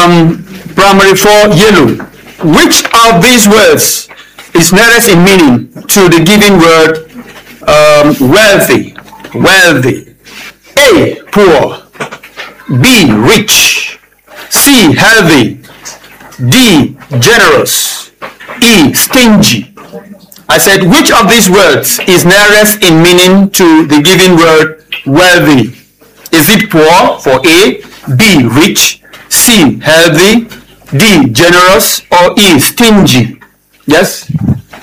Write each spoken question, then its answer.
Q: Which of these words is nearest in meaning to the given word wealthy?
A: The answer is B. Rich.